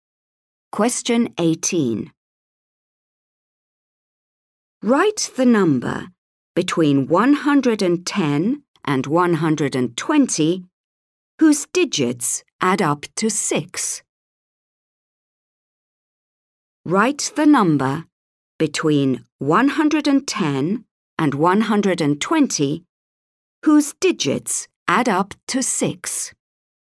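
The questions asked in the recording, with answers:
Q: Write the number between 110 and 120 whose digits add up to 6.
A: 114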